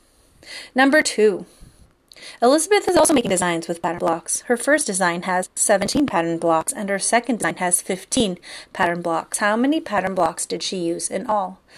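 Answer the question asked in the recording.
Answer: 32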